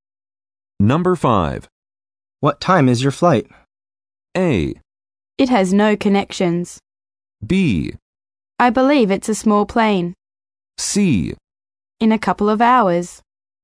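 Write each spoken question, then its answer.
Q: What time is your flight?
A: C: In a couple of hours.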